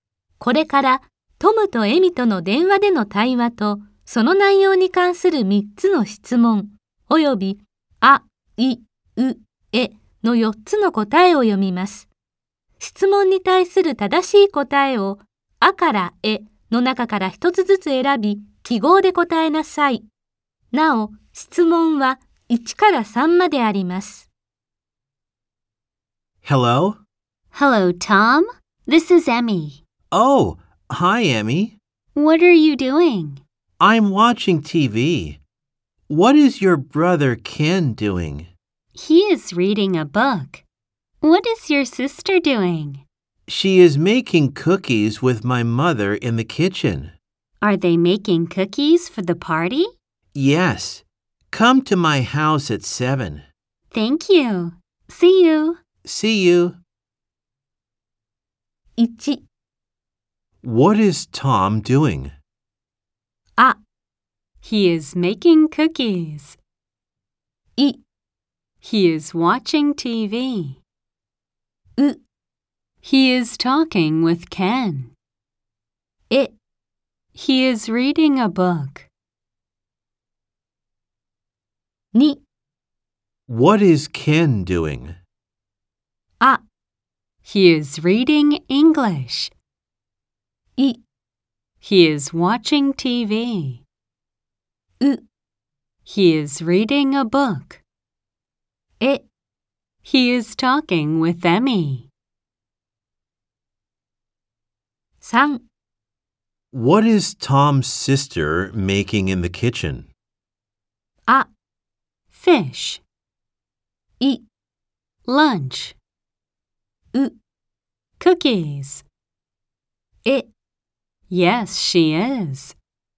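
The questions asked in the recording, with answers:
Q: What is Tom doing?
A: I: He is watching TV.

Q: What is Ken doing?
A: U: He is reading a book.

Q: What is Tom's sister making in the kitchen?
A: U: Cookies.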